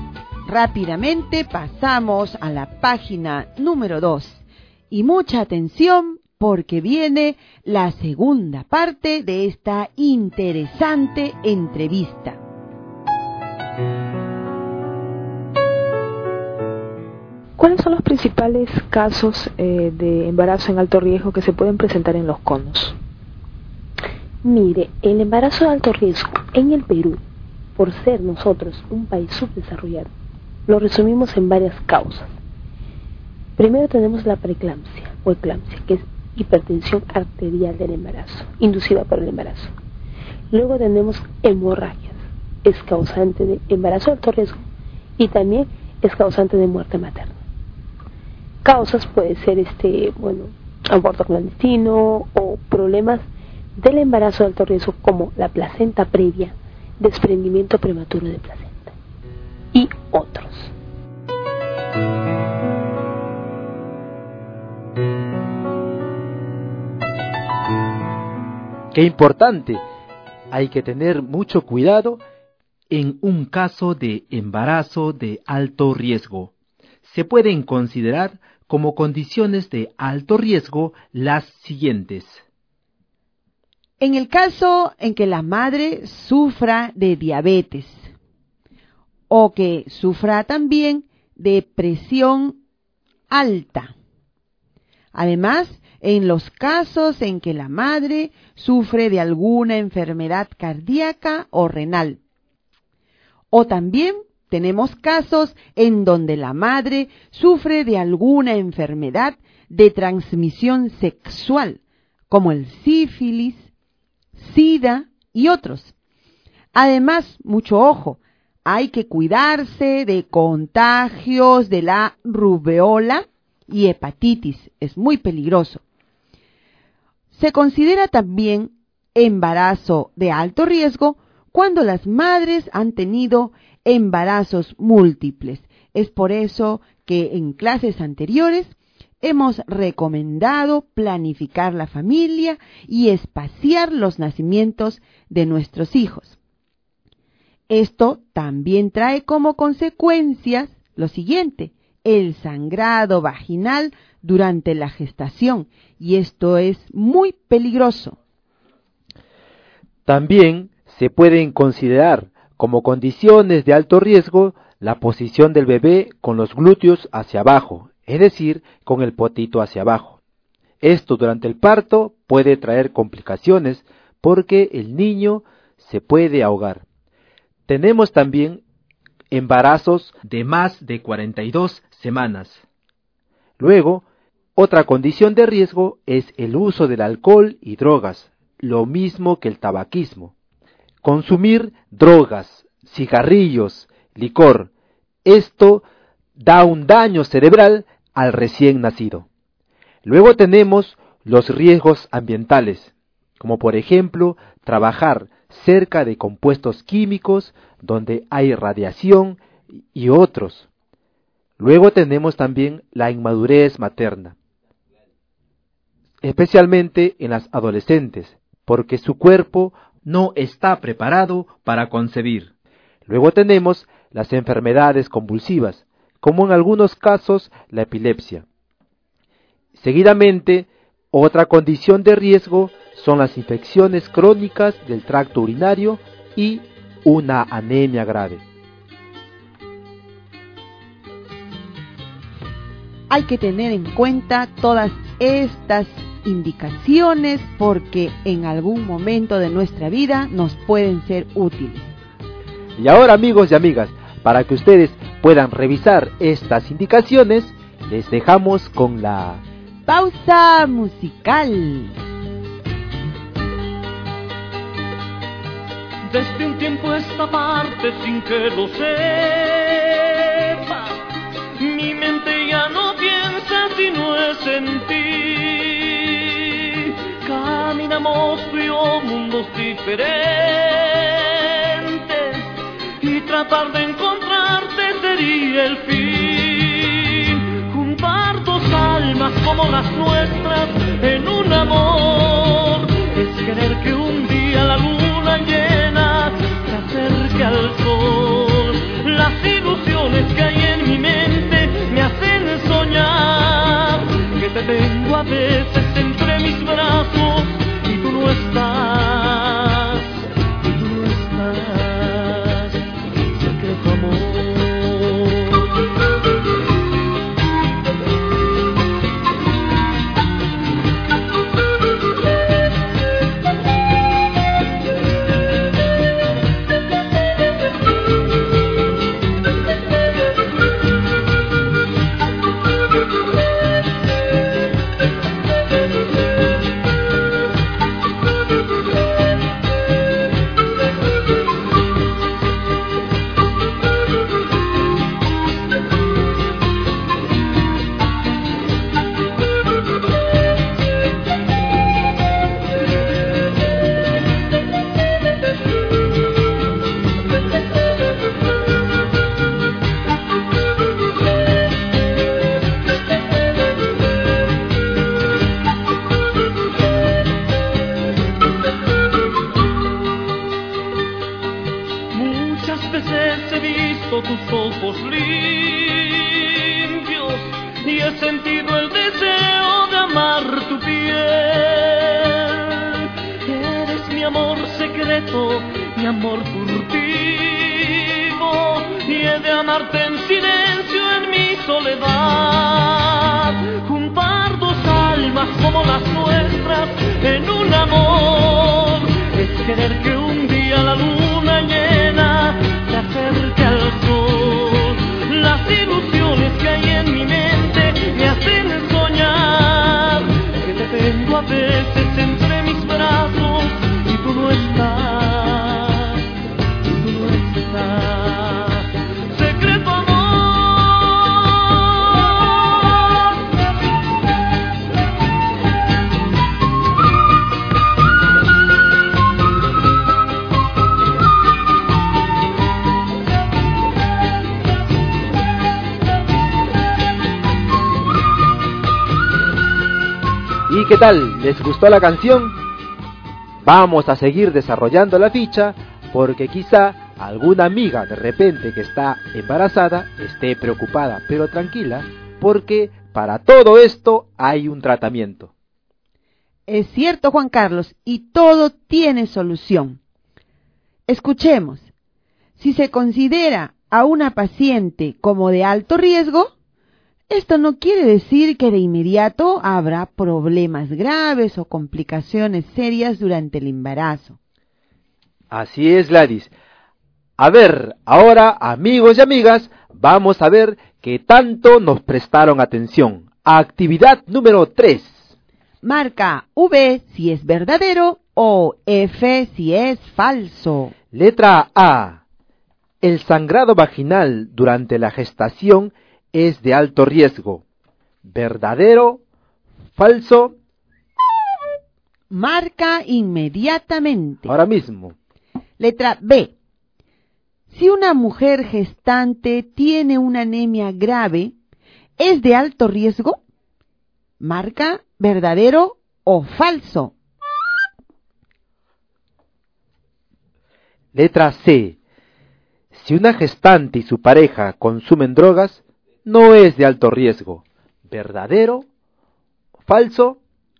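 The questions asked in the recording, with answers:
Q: Letra A. El sangrado vaginal durante la gestación es de alto riesgo.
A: Verdadero

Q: Letra B. Si una mujer gestante tiene una anemia grave, ¿es de alto riesgo?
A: Verdadero

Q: Letra C. Si una gestante y su pareja consumen drogas, no es de alto riesgo.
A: Falso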